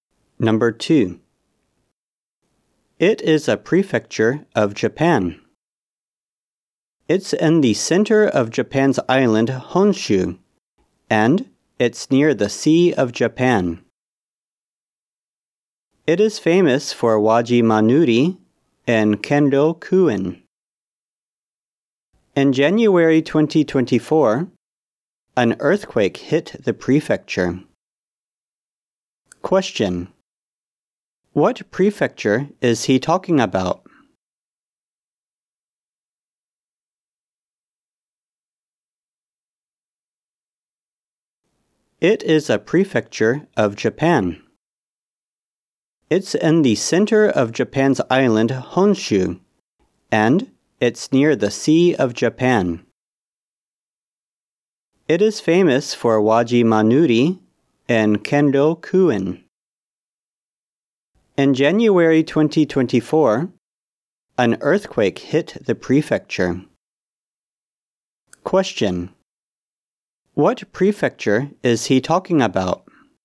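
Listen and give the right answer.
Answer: Ishikawa Prefecture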